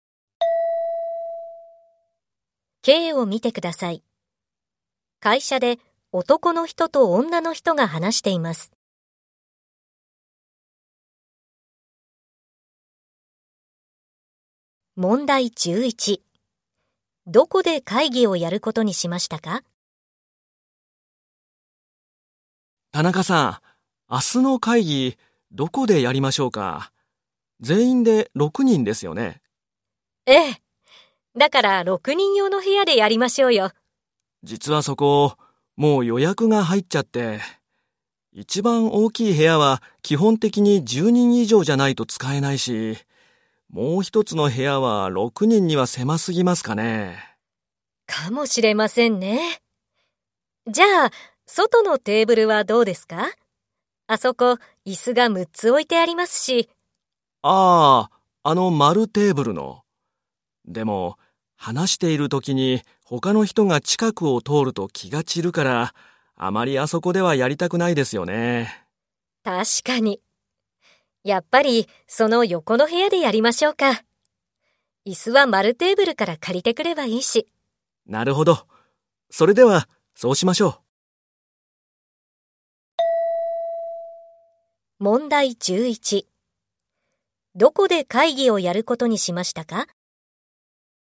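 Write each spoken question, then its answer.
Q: どこで会議をやることにしましたか?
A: 丸テーブルの横の部屋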